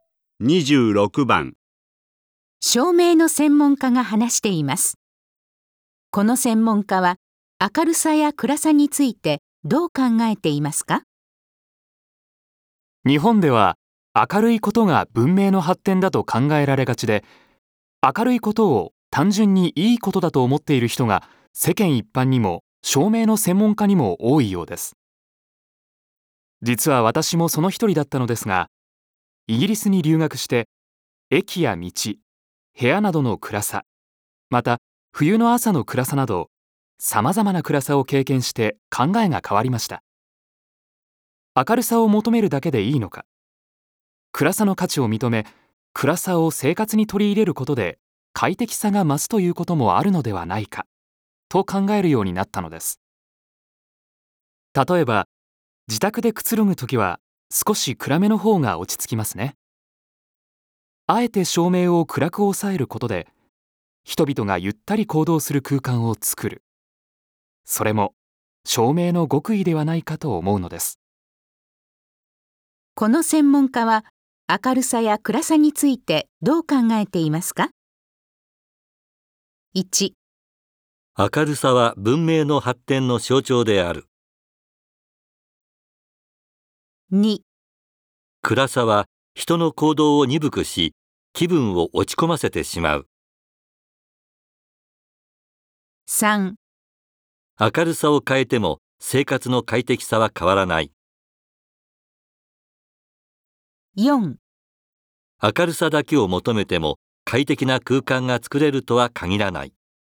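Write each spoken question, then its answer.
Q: この専門家は明るさや暗さについてどう考えていますか?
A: 4: 明るさだけを求めても快適な空間が作れるとは限らない。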